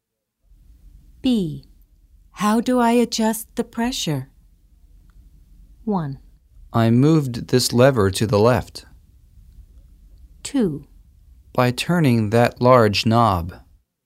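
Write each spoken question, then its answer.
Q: How do I adjust the pressure?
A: 2: By turning that large knob.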